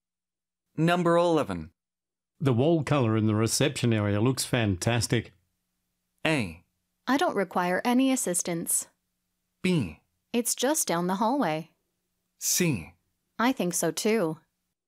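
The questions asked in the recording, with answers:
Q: The wall colour in the reception area looks fantastic.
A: C: I think so too.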